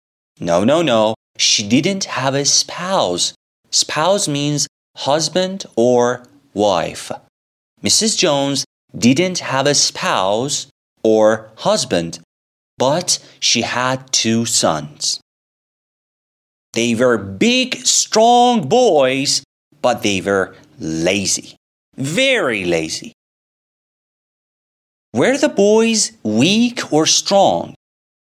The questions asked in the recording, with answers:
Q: Were the boys weak or strong?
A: The boys were very strong.